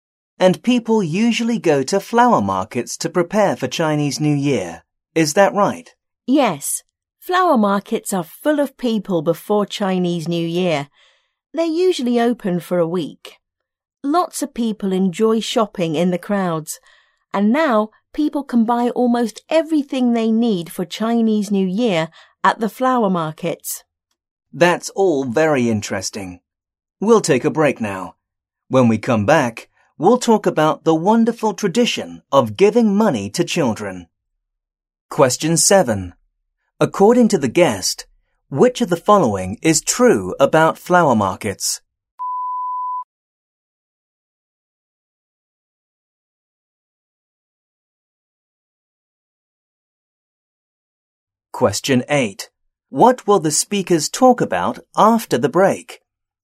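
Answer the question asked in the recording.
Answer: The tradition of giving money to children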